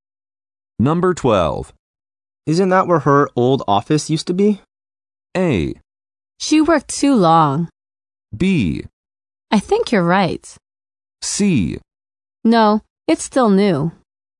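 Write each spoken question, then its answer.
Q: Isn't that where her old office used to be?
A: B: I think you're right.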